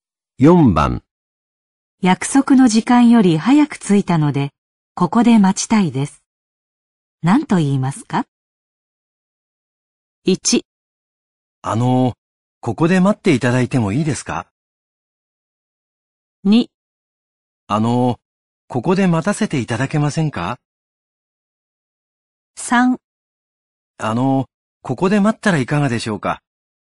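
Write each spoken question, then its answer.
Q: 何と言いますか?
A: 2: ここで待たせていただけませんか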